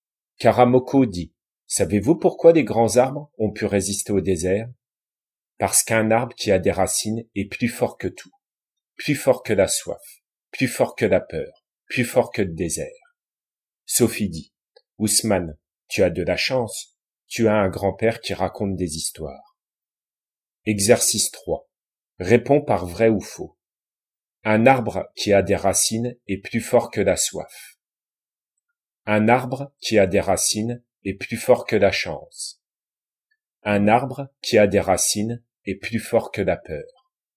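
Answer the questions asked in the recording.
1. vrai
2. faux
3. vrai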